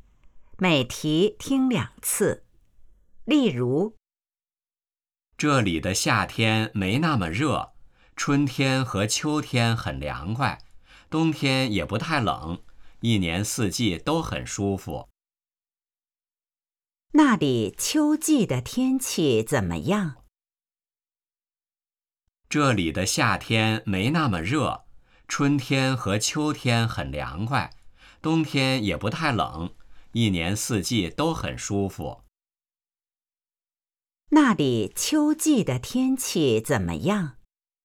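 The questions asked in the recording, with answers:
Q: 那里秋季的天气怎么样?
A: 很凉快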